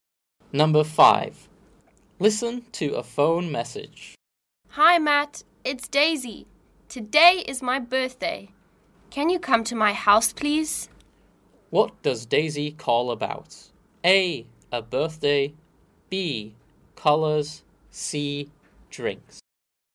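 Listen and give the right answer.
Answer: A: A birthday.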